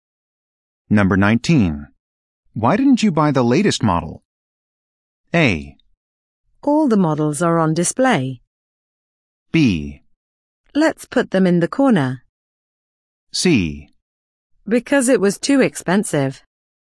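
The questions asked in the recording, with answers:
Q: Why didn't you buy the latest model?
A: C: Because it was too expensive.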